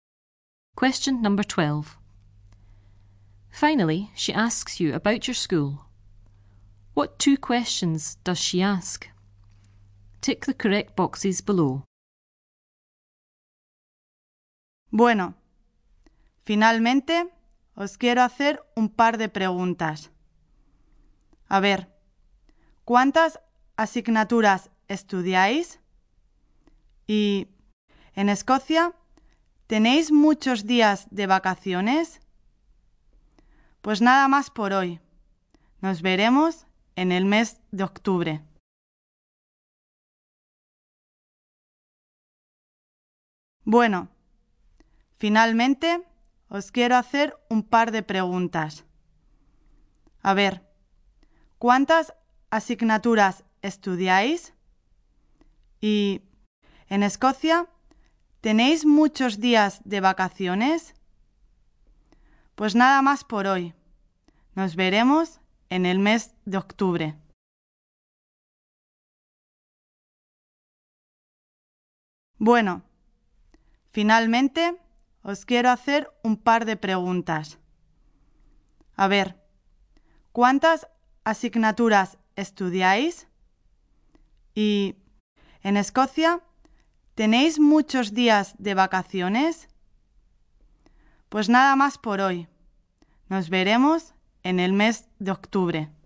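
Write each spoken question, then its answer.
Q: What two questions does she ask?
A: How many subjects do you study, and do you have many days of holidays in Scotland?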